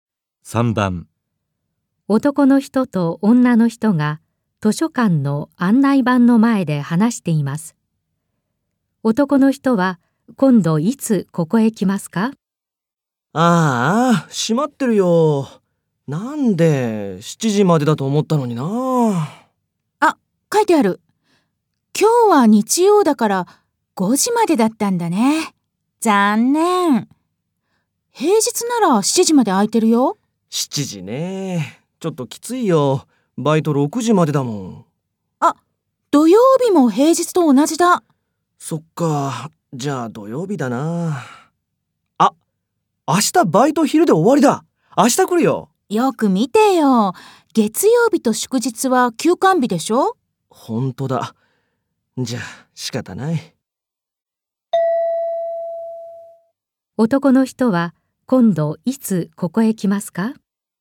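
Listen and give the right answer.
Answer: 土曜日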